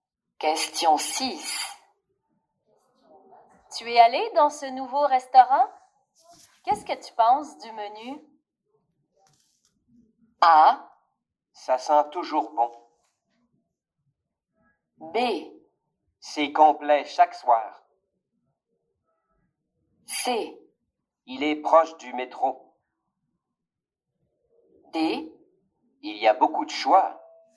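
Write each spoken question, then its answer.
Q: Qu'est-ce que tu penses du menu?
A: D: Il y a beaucoup de choix.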